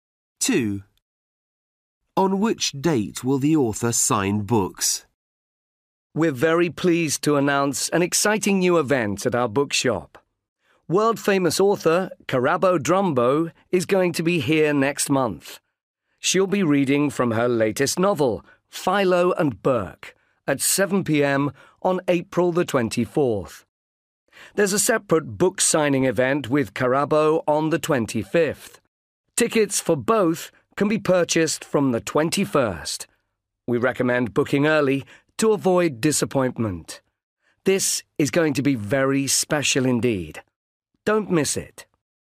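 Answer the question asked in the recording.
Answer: April 25th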